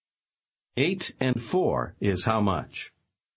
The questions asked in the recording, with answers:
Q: Eight and four is how much?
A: 12.